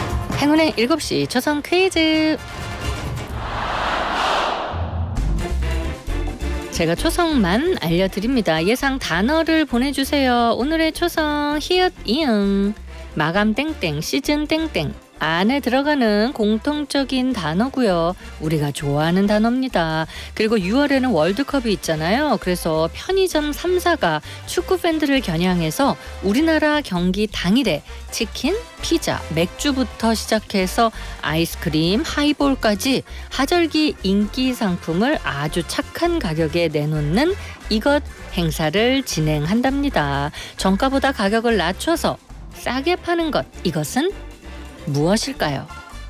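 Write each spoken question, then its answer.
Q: 정가보다 가격을 낮춰서 싸게 파는 것, 이것은 무엇일까요?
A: 할인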